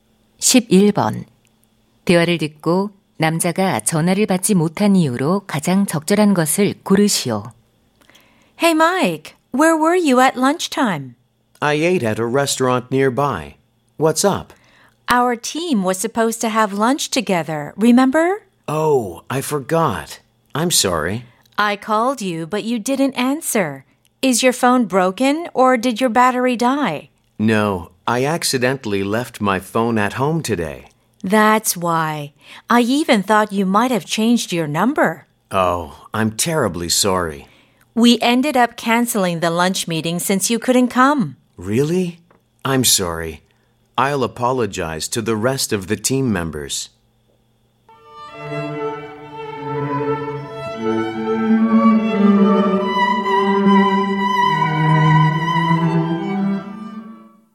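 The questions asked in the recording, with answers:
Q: 대화를 듣고 남자가 전화를 받지 못한 이유로 가장 적절한 것을 고르시오.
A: 실수로 휴대폰을 집에 두고 와서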